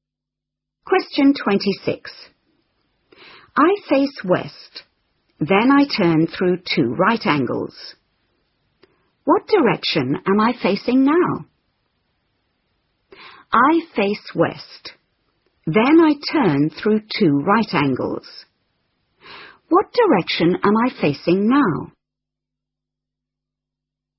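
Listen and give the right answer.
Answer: East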